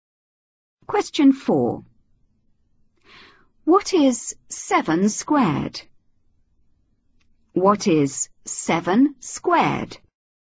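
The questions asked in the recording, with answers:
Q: What is 7 squared?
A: 49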